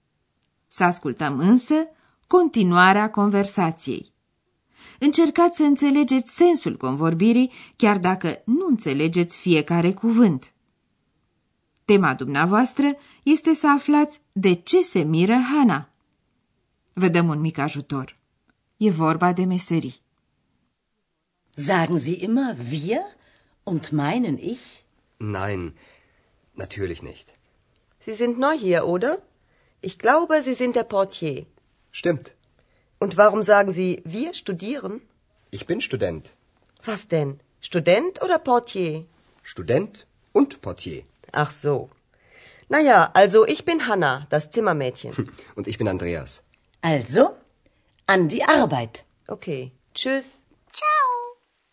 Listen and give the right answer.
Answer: Hana se miră de faptul că Andreea spune că e student, deși mai înainte a admis că e portar.